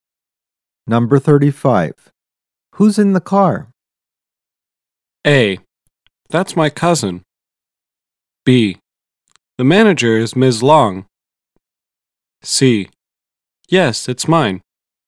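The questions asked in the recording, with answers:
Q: Who's in the car?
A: A: That's my cousin.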